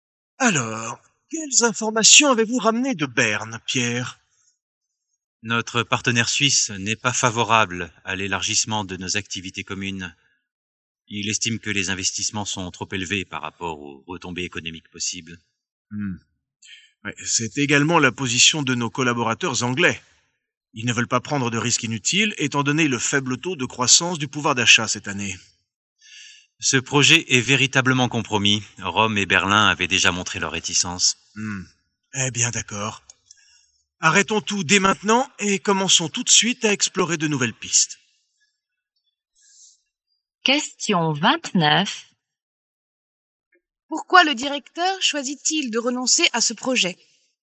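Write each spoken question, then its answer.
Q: Pourquoi le directeur choisit-il de renoncer à ce projet ?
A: Parce que tous les partenaires (suisse, anglais, Rome et Berlin) y sont défavorables.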